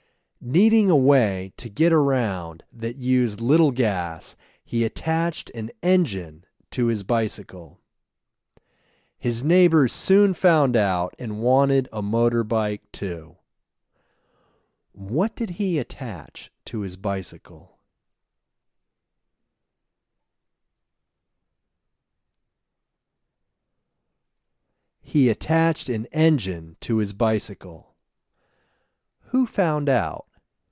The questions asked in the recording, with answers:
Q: What did he attach to his bicycle?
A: He attached an engine to his bicycle.

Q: Who found out?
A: His neighbors found out.